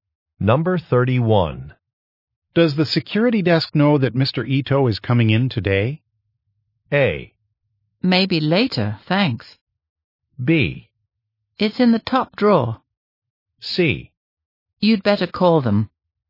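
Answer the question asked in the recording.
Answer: C: You'd better call them.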